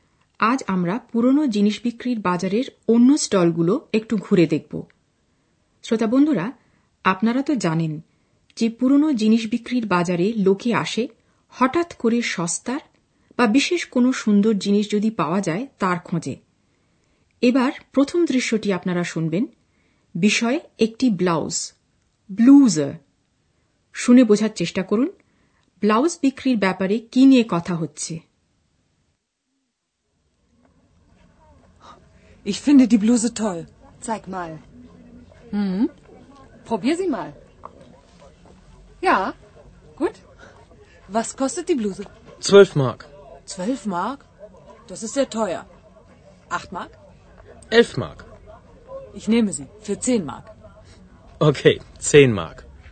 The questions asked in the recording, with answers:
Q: শুনে বোঝার চেষ্টা করুন blouse বিক্রির ব্যাপারে কি নিয়ে কথা হচ্ছে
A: দাম কমাবার চেষ্টা করা হচ্ছে